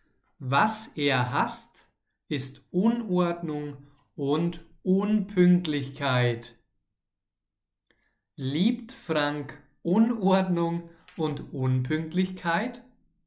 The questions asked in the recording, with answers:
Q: Liebt Frank Unordnung und Unpünktlichkeit?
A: Nein, er liebt es nicht. Er hasst es.